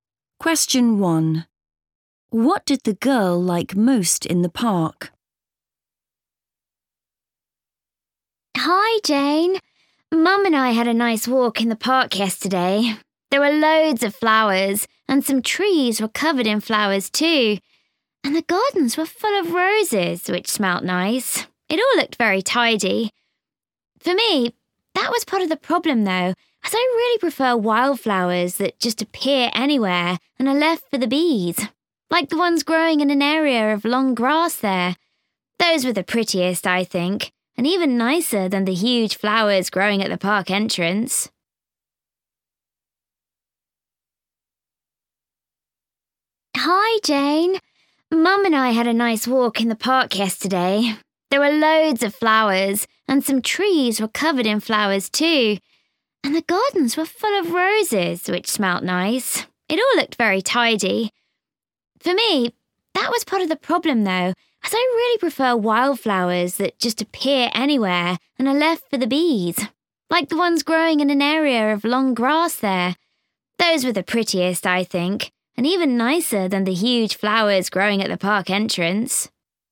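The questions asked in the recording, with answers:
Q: What did the girl like most in the park?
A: the wildflowers in the long grass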